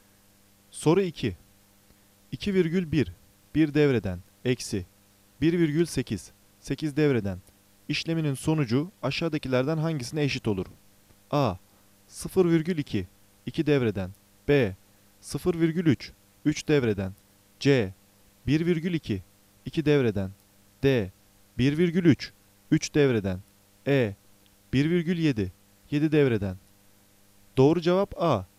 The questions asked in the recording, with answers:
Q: İşleminin sonucu aşağıdakilerden hangisine eşit olur?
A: Doğru cevap A. 0,2. 2 devreden.